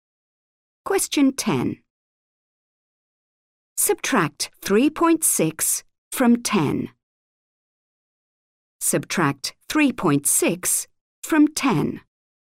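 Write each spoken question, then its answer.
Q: Subtract 3.6 from 10.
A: 6.4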